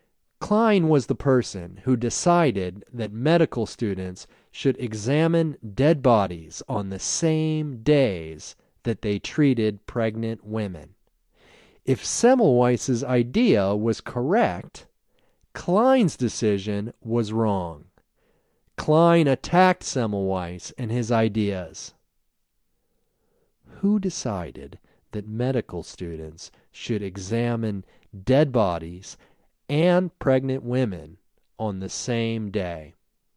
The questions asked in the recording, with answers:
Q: Who decided that medical students should examine dead bodies and pregnant women on the same day?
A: Klein decided that medical students should examine dead bodies and pregnant women on the same day.